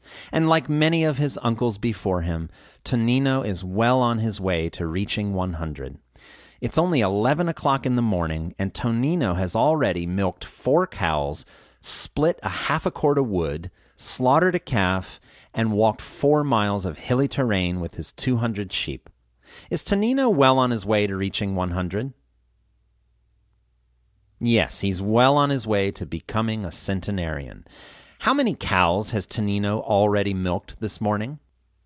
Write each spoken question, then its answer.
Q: How many cows has Tonino already milked this morning?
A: He's already milked 4 cows.